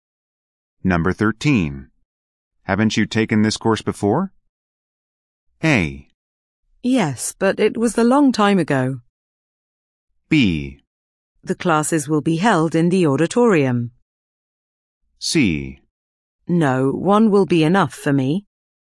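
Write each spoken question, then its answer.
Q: Haven't you taken this course before?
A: A: Yes, but it was a long time ago.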